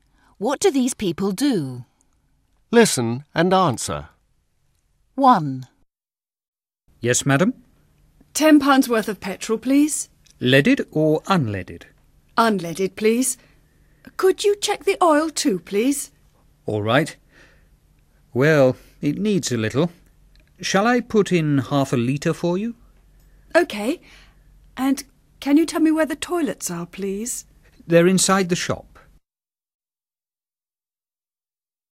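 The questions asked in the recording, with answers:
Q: What do these people do?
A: He works at a petrol station (petrol pump attendant); she is a customer buying petrol.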